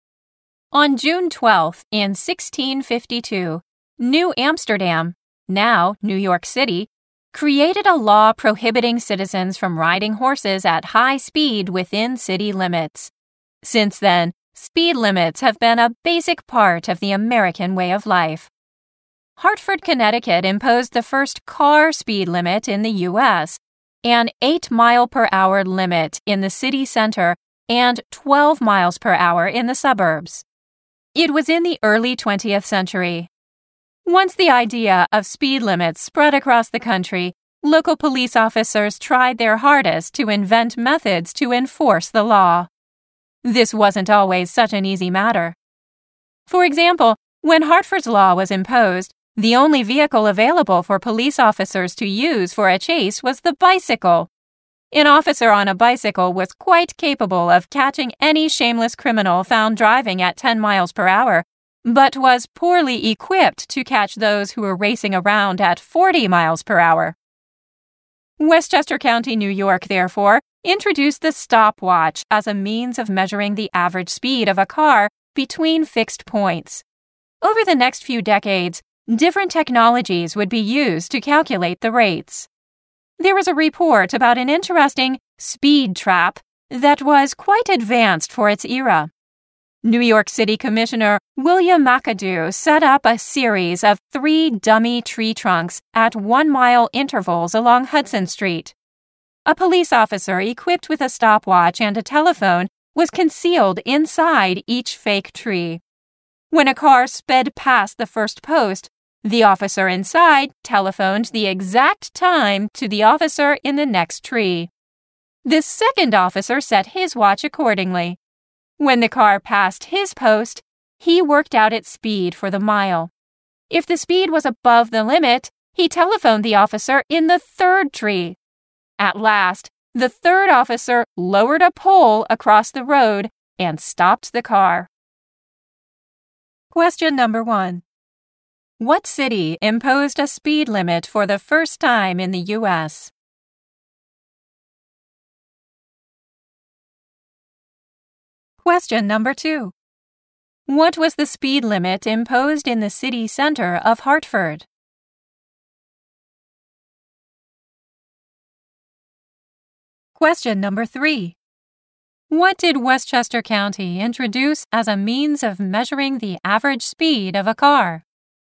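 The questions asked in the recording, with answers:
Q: What was the speed limit imposed in the city center of Hartford?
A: 8 miles per hour

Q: What did Westchester County introduce as a means of measuring the average speed of a car?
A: The stopwatch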